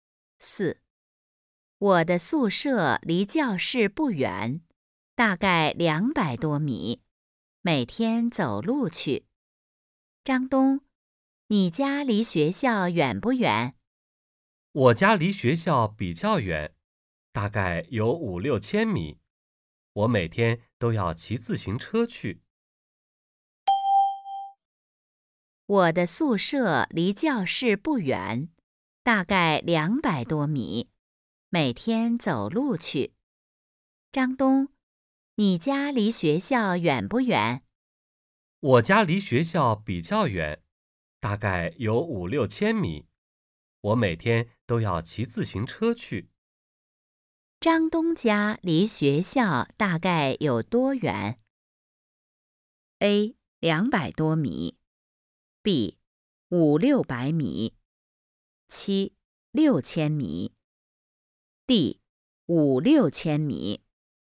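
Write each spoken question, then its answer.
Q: 张东家离学校大概有多远?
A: D: 5-6千米。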